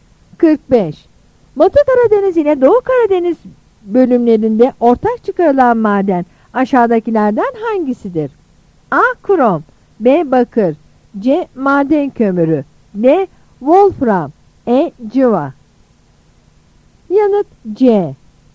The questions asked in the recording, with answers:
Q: Batı Karadeniz ile Doğu Karadeniz bölümlerinde ortak çıkarılan maden aşağıdakilerden hangisidir?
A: Yanıt C.